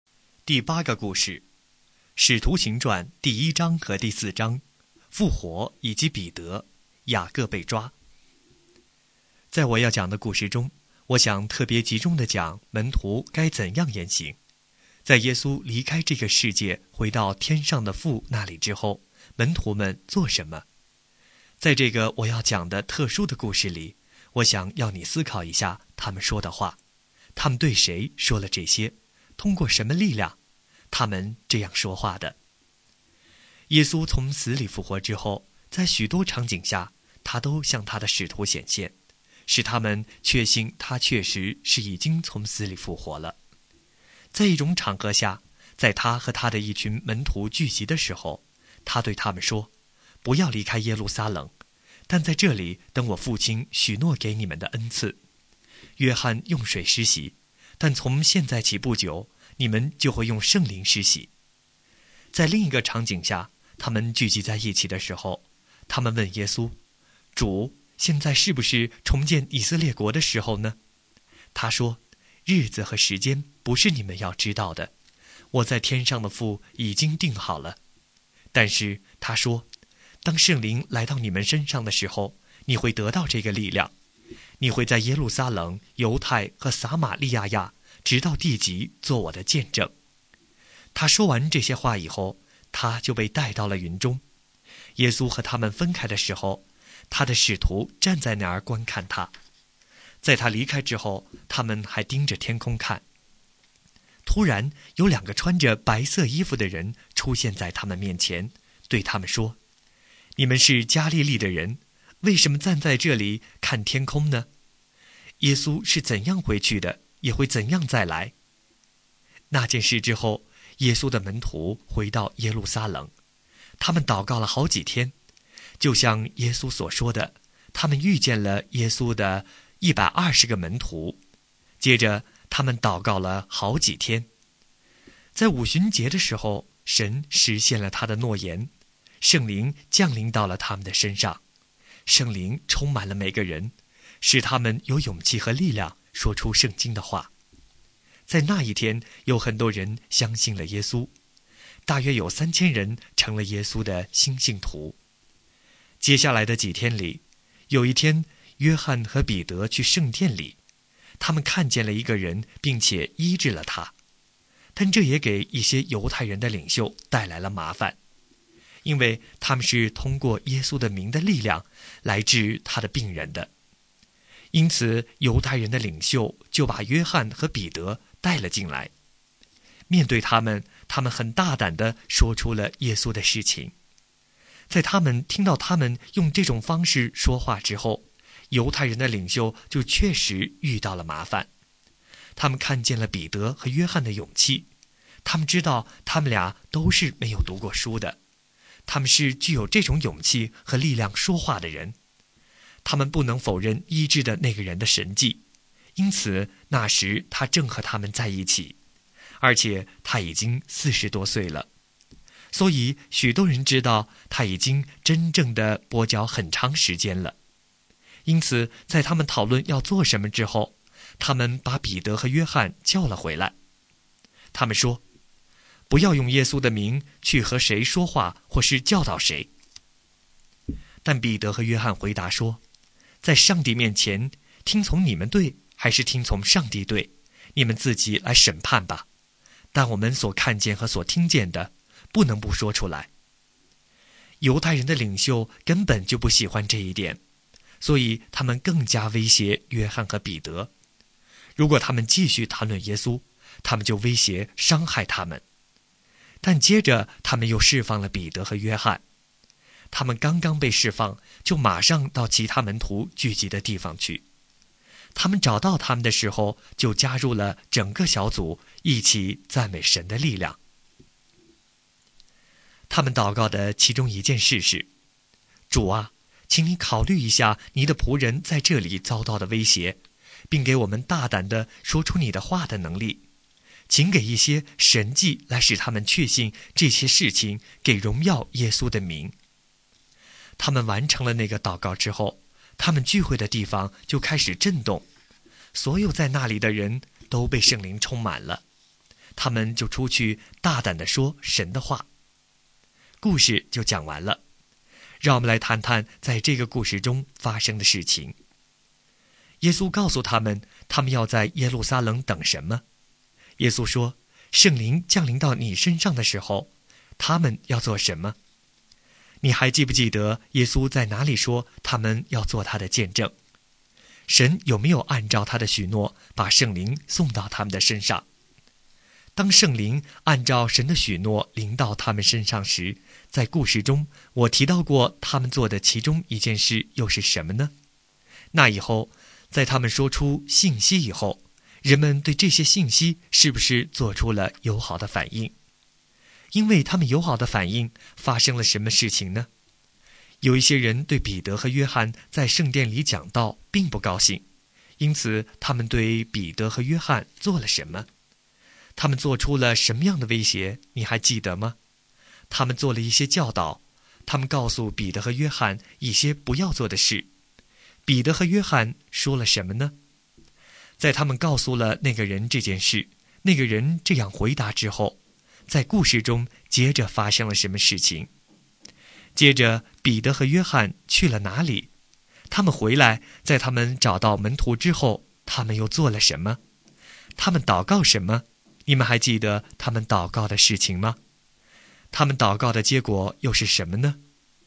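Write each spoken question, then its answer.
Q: 耶稣告诉他们,他们要在耶路撒冷等什么?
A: 等父许诺的恩赐,即圣灵

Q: 耶稣说,圣灵降临到你身上的时候,他们要做什么?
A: 得到力量,做耶稣的见证

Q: 你还记不记得耶稣在哪里说他们要做他的见证?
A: 在耶路撒冷、犹太和撒玛利亚,直到地极

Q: 神有没有按照他的许诺把圣灵送到他们的身上?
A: 有,在五旬节

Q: 因此他们对彼得和约翰做了什么?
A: 把他们抓来审问

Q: 彼得和约翰说了什么呢?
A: 听从你们还是听从上帝对,你们自己审判吧;我们所看见和听见的不能不说

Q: 接着彼得和约翰去了哪里?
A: 到其他门徒聚集的地方

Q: 他们祷告的结果又是什么呢?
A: 聚会的地方震动,众人被圣灵充满,出去大胆讲神的道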